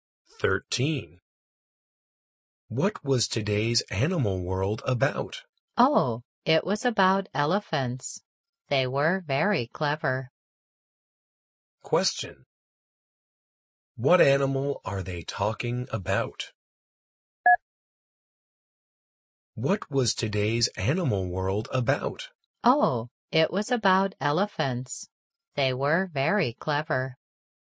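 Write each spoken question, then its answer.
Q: What animal are they talking about?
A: Elephants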